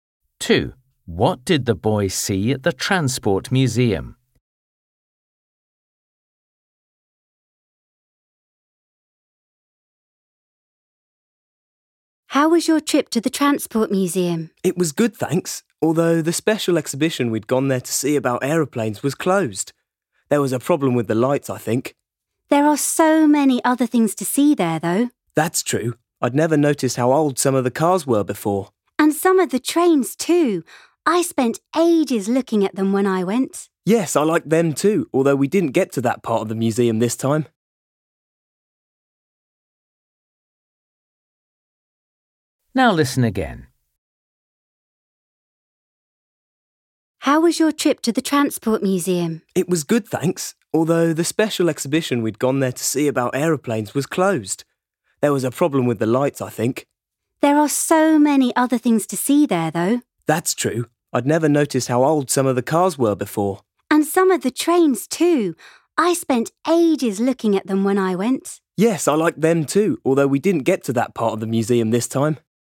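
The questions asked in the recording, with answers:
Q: What did the boy see at the Transport Museum?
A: old cars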